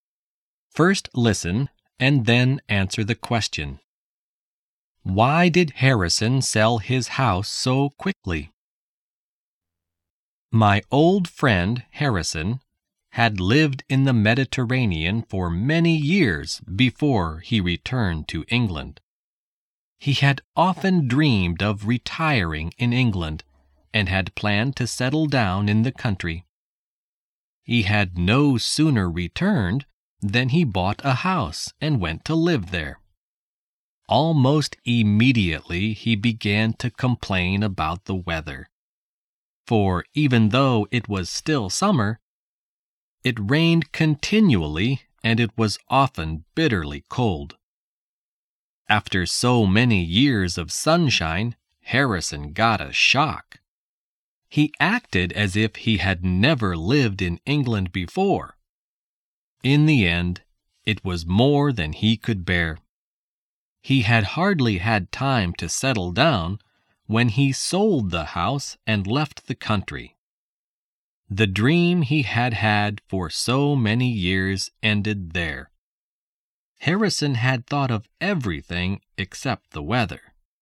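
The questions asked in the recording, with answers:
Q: Why did Harrison sell his house so quickly?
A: Because he couldn't bear the English weather: it rained continually and was often bitterly cold.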